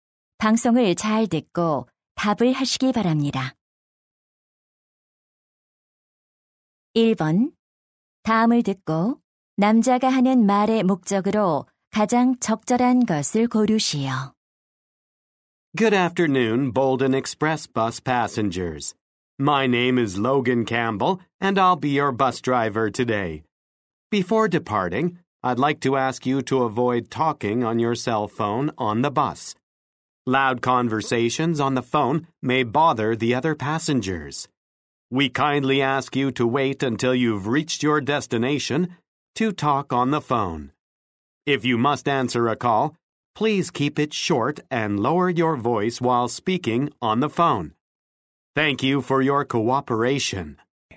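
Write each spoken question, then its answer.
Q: 다음을 듣고 남자가 하는 말의 목적으로 가장 적절한 것을 고르시오.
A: 버스 안에서 휴대전화 통화를 자제해 달라고 요청하려고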